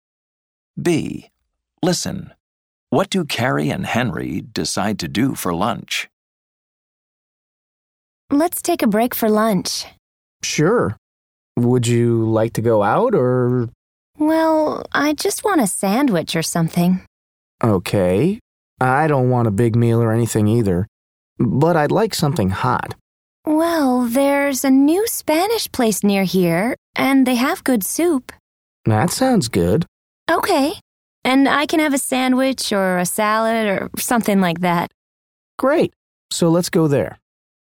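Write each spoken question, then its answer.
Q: What do Carrie and Henry decide to do for lunch?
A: Go to the new Spanish place nearby for soup and a sandwich or salad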